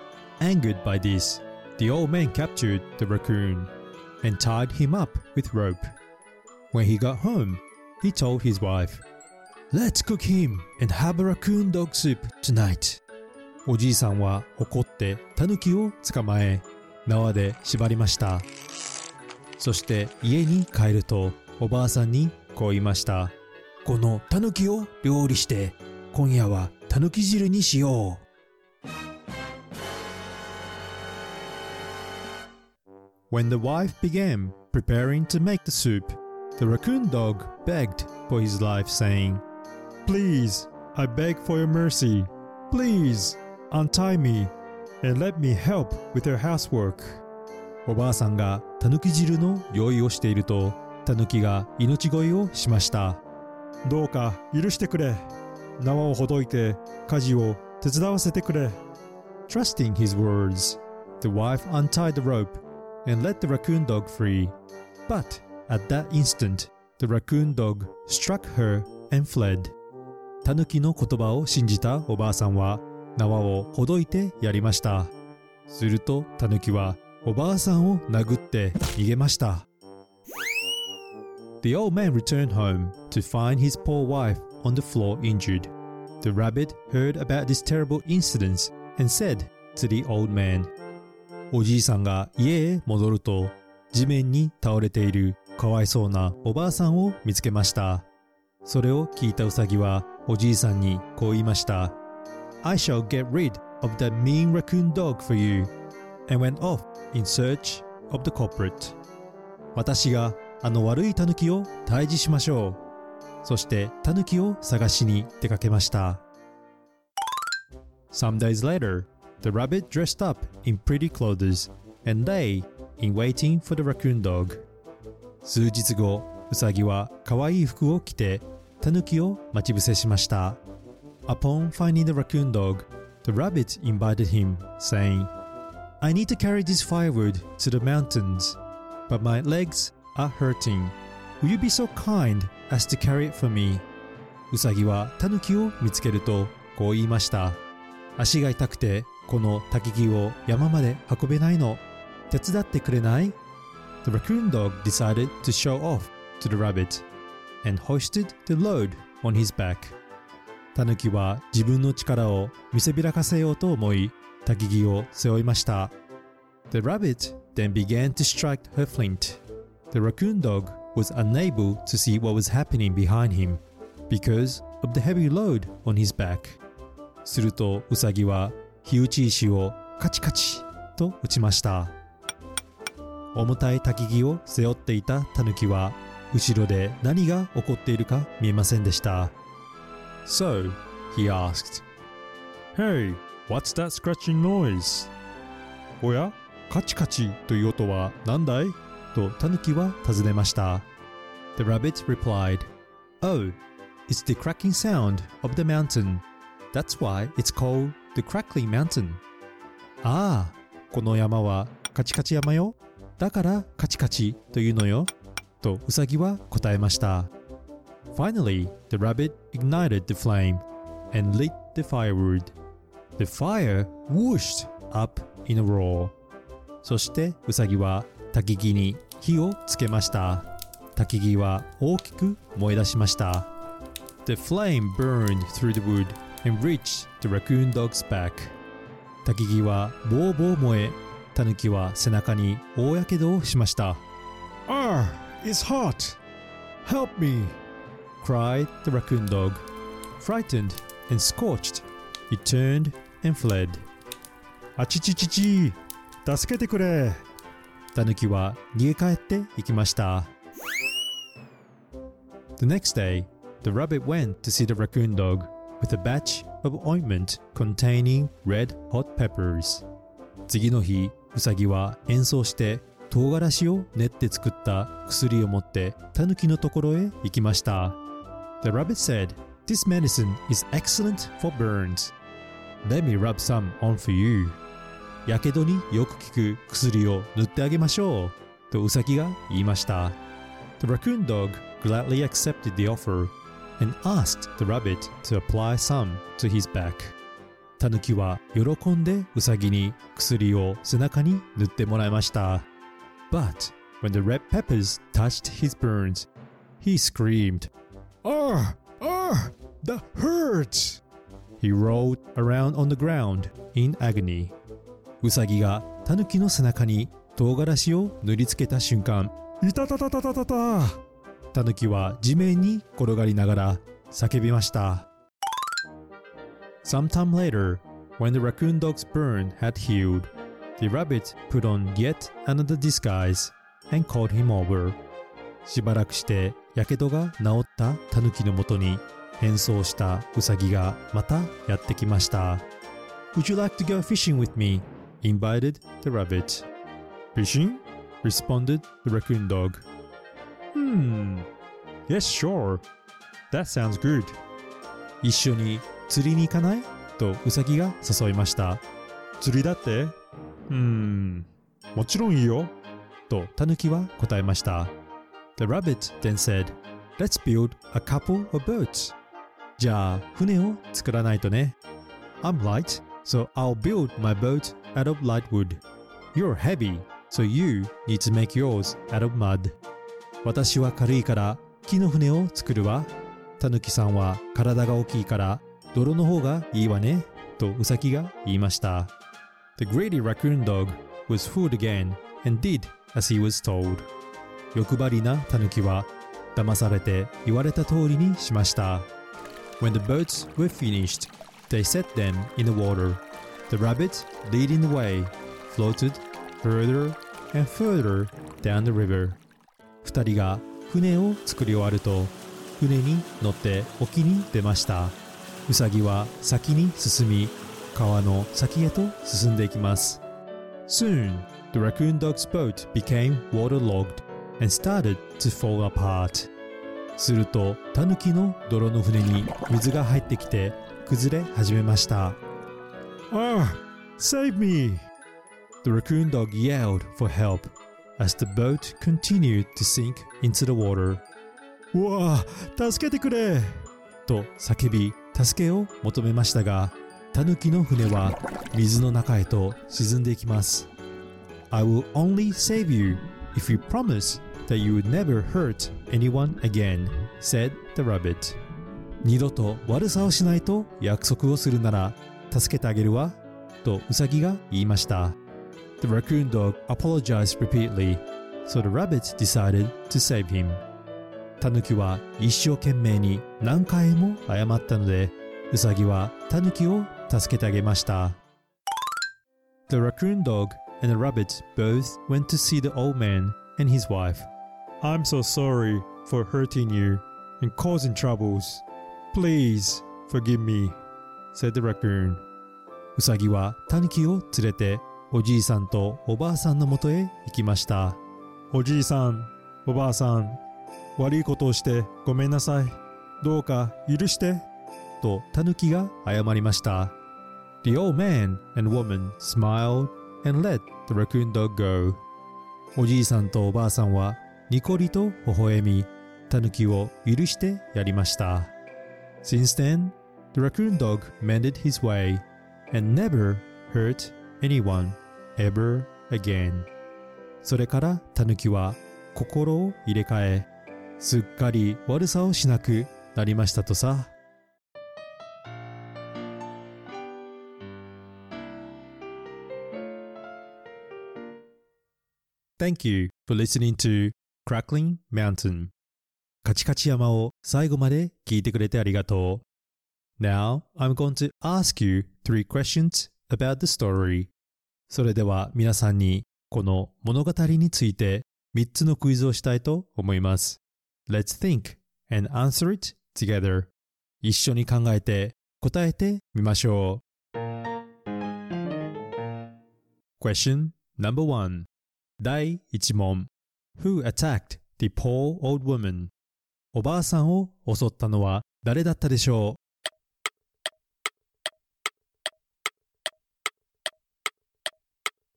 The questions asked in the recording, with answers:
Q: Who attacked the poor old woman?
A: He was the raccoon dog